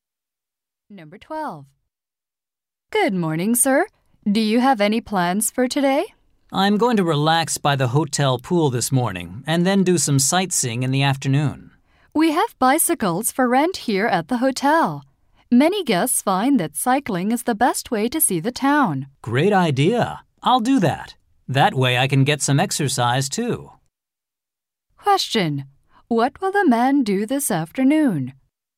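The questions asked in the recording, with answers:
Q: What will the man do this afternoon?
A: Rent a bicycle and go sightseeing.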